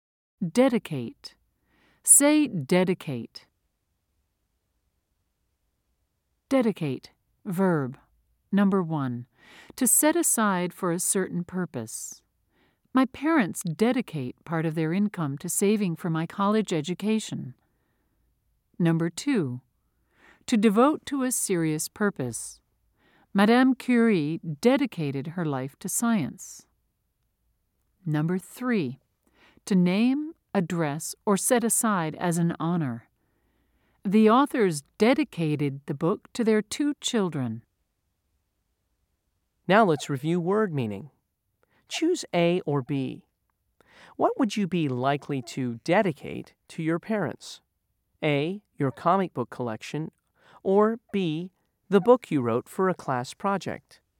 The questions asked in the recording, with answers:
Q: Choose A or B. What would you be likely to dedicate to your parents? A, your comic book collection, or B, the book you wrote for a class project?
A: If you said B, you're correct.